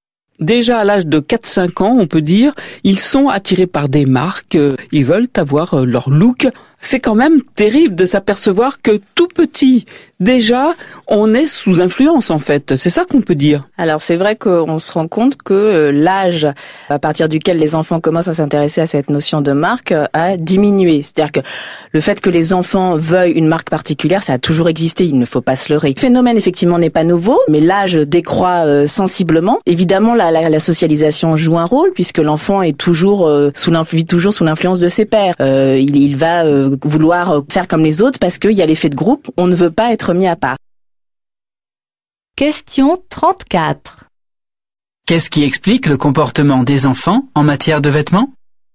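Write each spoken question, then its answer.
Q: Qu'est-ce qui explique le comportement des enfants en matière de vêtements ?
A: L'influence des pairs, l'effet de groupe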